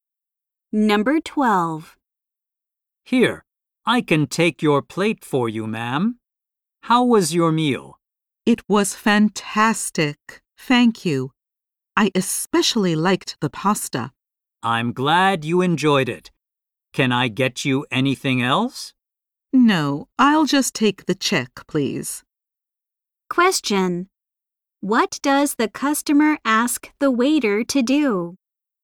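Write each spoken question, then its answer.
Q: What does the customer ask the waiter to do?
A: Bring the check.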